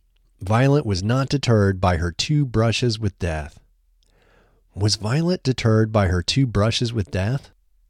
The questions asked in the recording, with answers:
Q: Was Violet deterred by her two brushes with death?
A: No, Violet was not deterred by her two brushes with death.